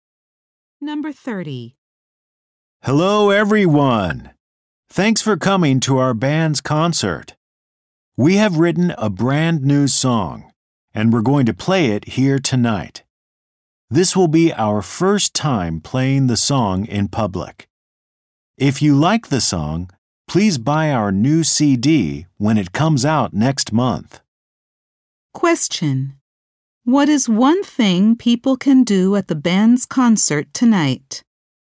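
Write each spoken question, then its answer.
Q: What is one thing people can do at the band's concert tonight?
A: Hear the band's brand new song for the first time.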